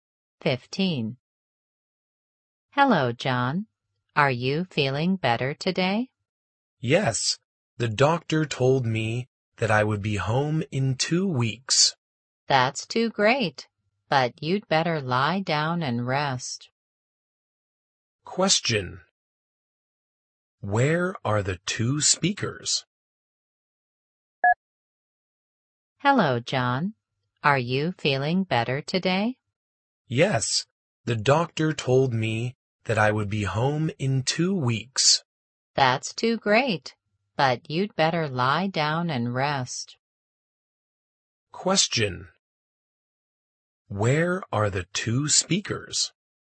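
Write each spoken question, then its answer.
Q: Where are the two speakers?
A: In a hospital.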